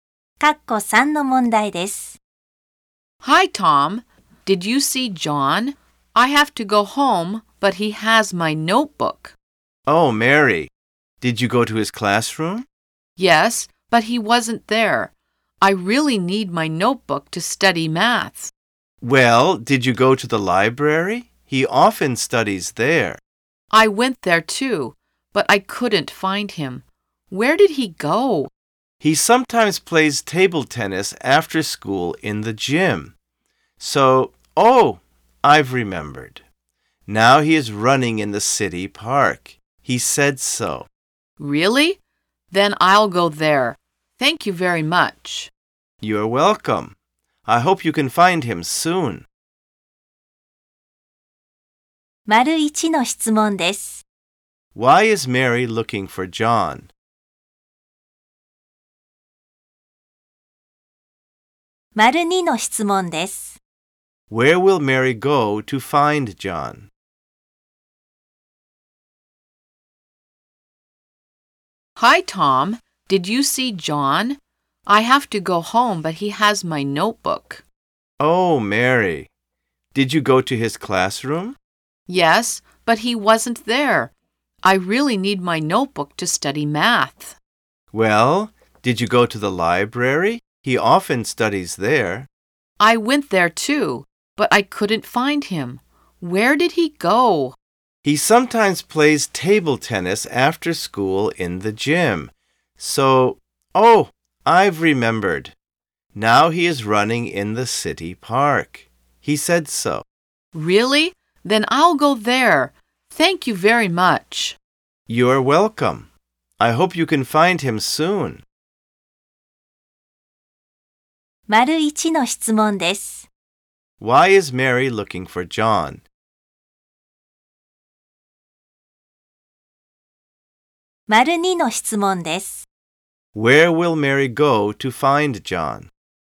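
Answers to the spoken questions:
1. Because he has her notebook and she needs it to study math
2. To the city park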